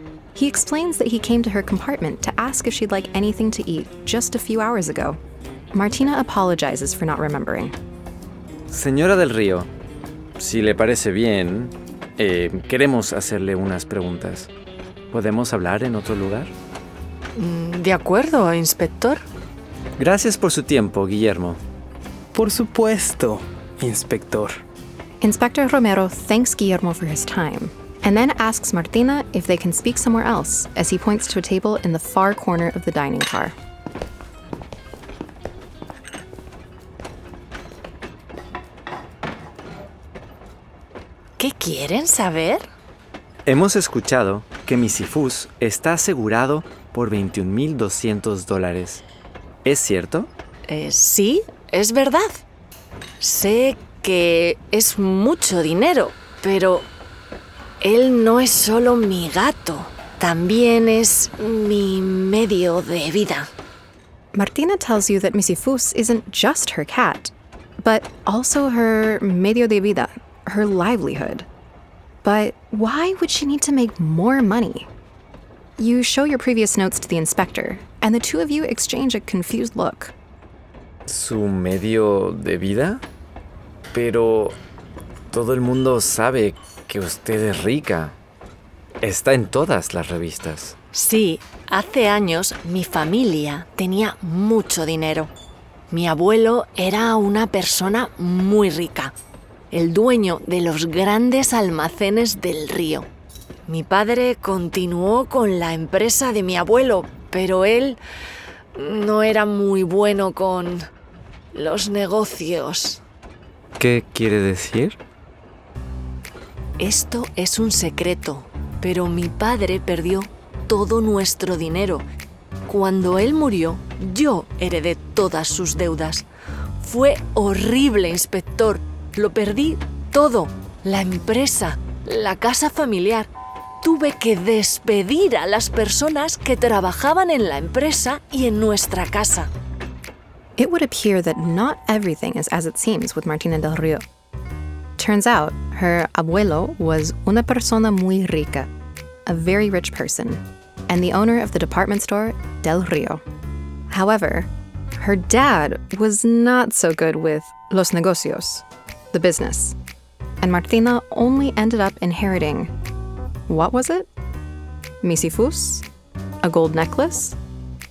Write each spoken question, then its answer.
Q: And Martina only ended up inheriting what was it?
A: Correcto. She only inherited deudas, debts.